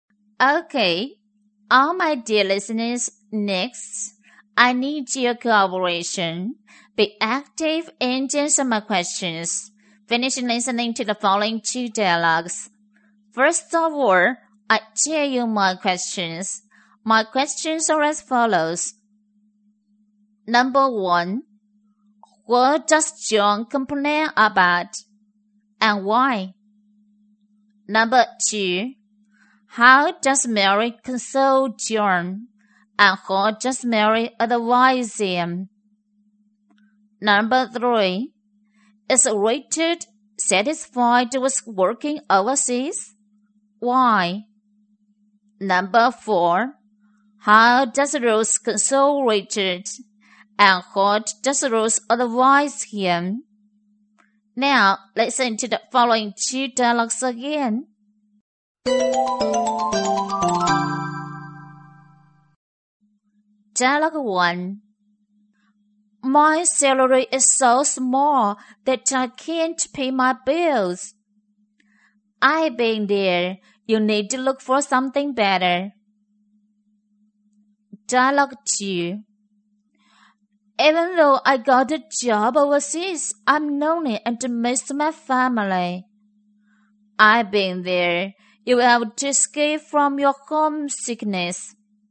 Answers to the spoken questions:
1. John complains about his salary. Because his salary is so small that he can't pay his bills.
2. She consoles him by saying, I've been there, and she advises him to look for a better job.
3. No, he doesn't, because he feels alone, which comes off thinking of his family.
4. She consoles him by saying, I've been there, and she advises him to escape from his homesickness.